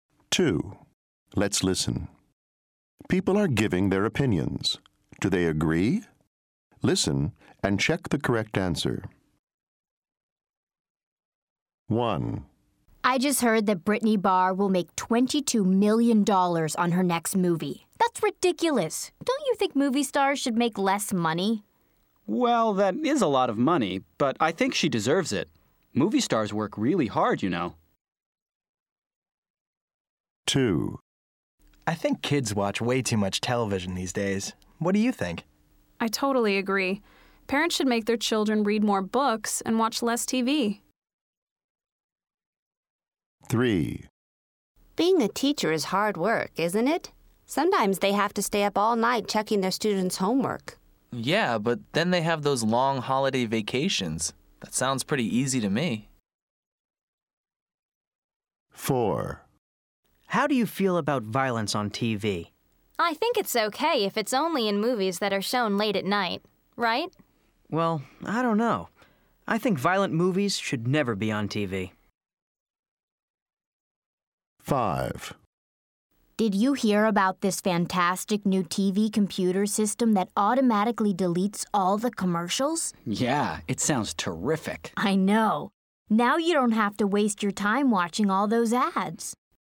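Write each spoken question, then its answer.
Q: Do they agree?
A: No

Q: Do they agree?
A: Yes

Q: Do they agree?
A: No

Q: Do they agree?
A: No

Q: Do they agree?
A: Yes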